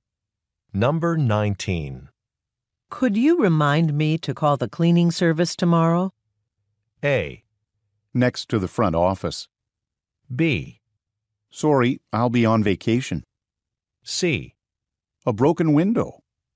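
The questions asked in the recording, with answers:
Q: Could you remind me to call the cleaning service tomorrow?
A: B: Sorry, I'll be on vacation.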